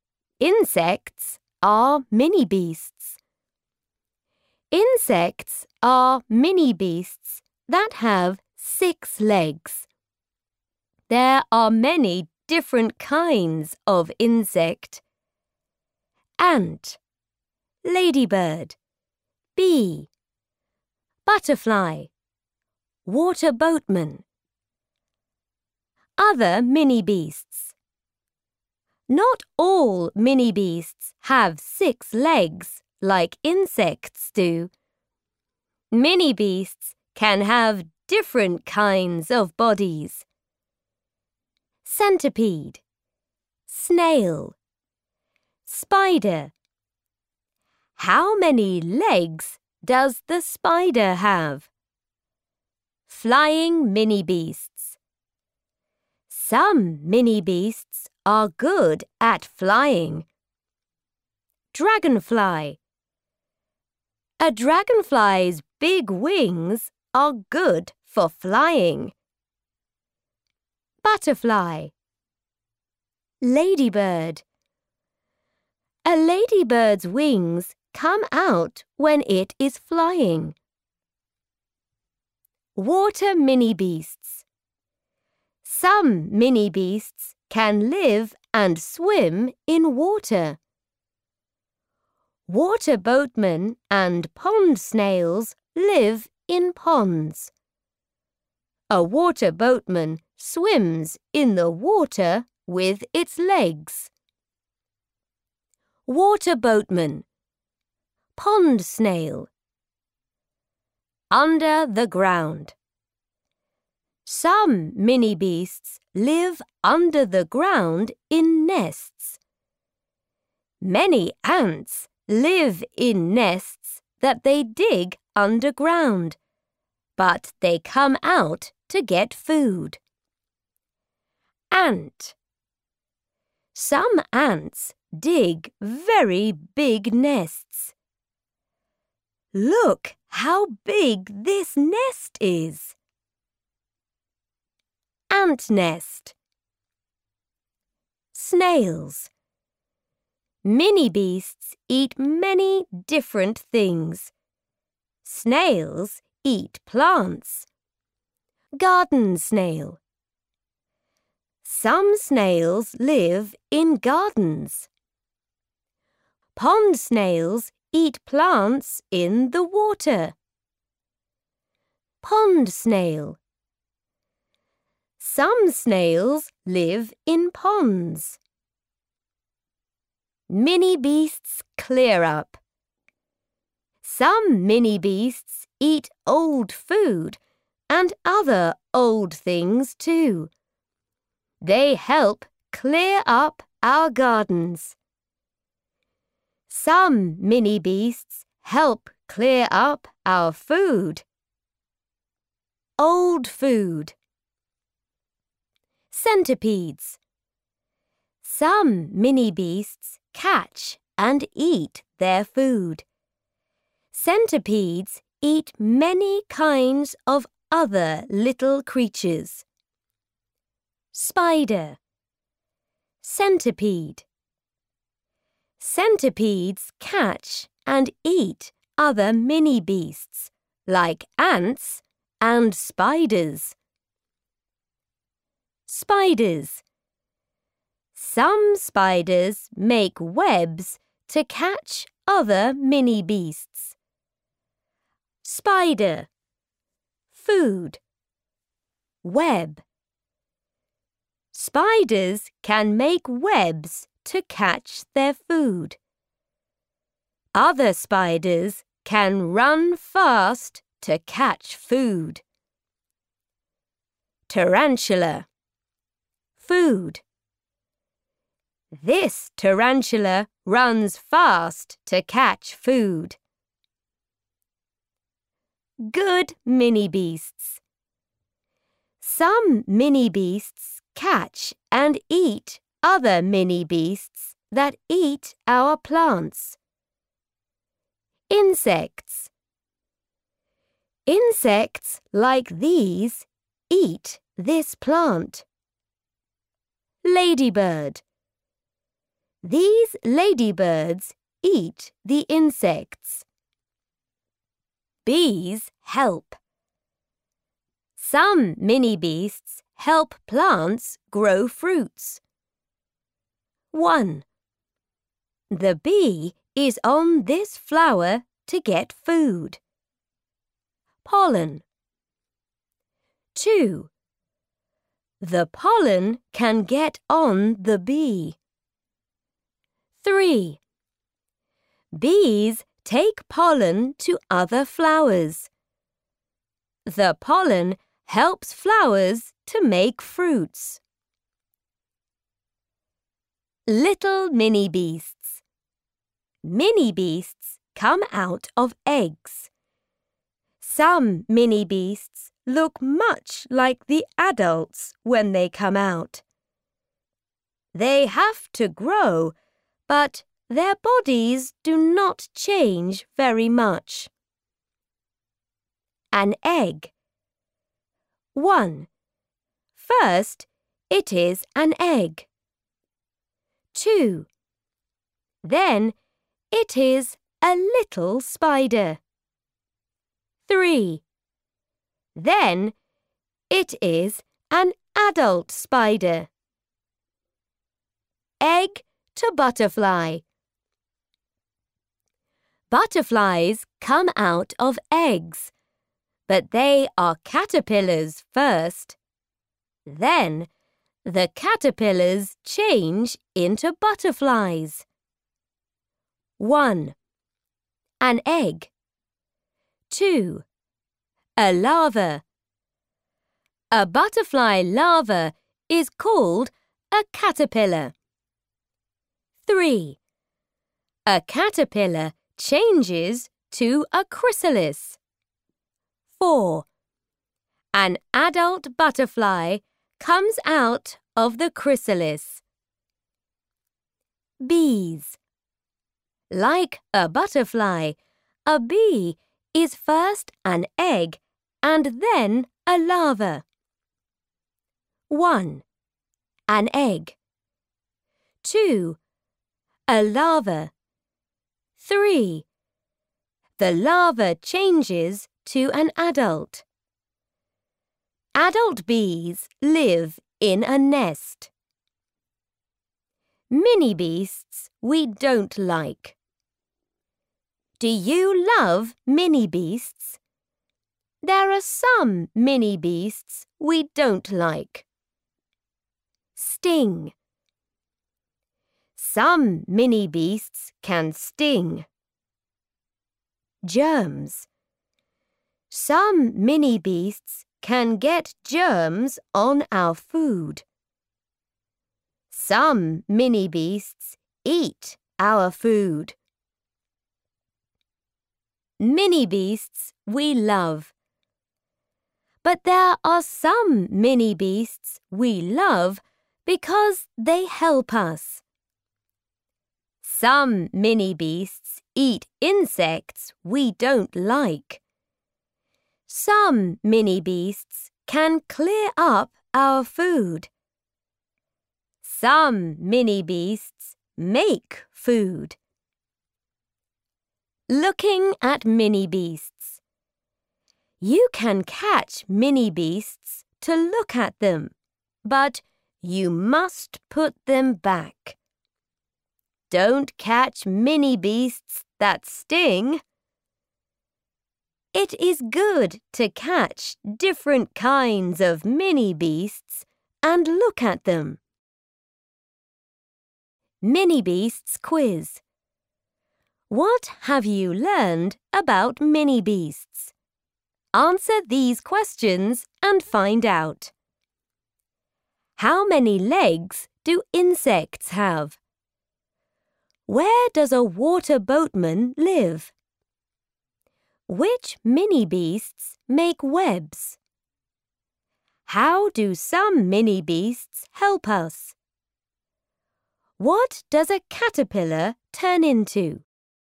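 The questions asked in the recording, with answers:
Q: Where does a water boatman live?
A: In ponds

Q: Which mini beasts make webs?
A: Spiders

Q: How do some mini beasts help us?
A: They eat insects we don't like, clear up old food, help plants grow fruits, and make food

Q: What does a caterpillar turn into?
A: A chrysalis, then a butterfly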